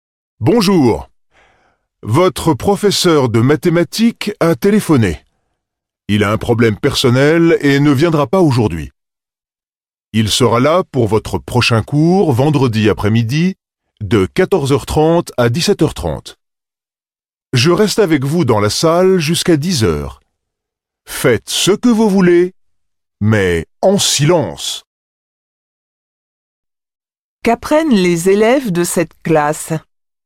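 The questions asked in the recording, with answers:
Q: Qu'apprennent les élèves de cette classe?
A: Leur professeur de mathématiques est absent aujourd'hui.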